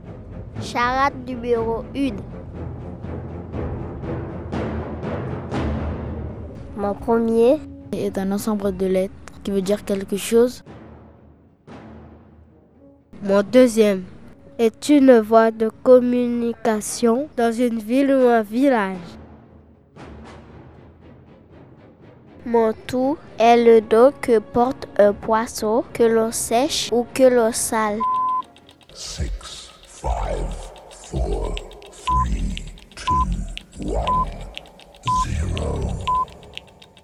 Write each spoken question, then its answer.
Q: Mon tout est le dos que porte un poisson que l'on sèche ou que l'on sale.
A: une morue.